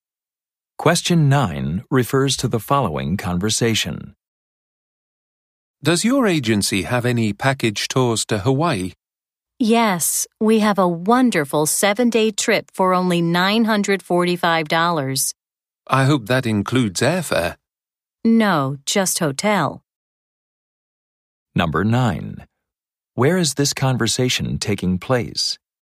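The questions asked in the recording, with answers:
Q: Where is this conversation taking place?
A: At a travel agency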